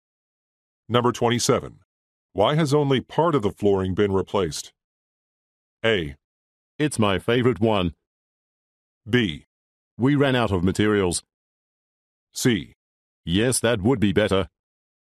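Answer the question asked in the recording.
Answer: B: We ran out of materials.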